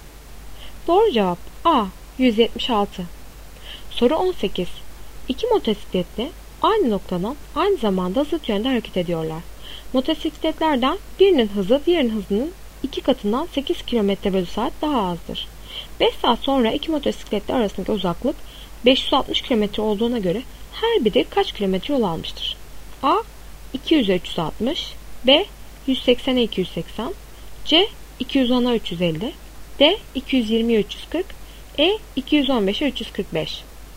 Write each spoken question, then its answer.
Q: 5 saat sonra iki motosikletli arasındaki uzaklık 560 km olduğuna göre her biri kaç kilometre yol almıştır?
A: Doğru cevap A. 200-360.